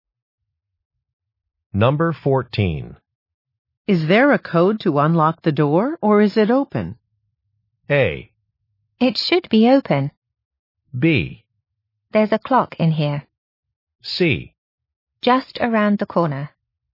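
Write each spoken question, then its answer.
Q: Is there a code to unlock the door, or is it open?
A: A: It should be open.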